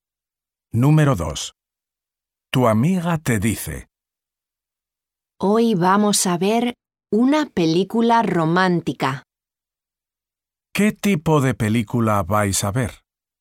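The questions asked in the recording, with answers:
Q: ¿Qué tipo de película vais a ver?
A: una película romántica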